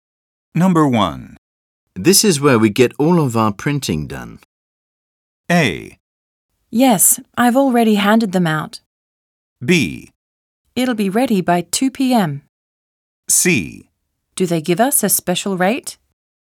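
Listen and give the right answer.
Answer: C: Do they give us a special rate?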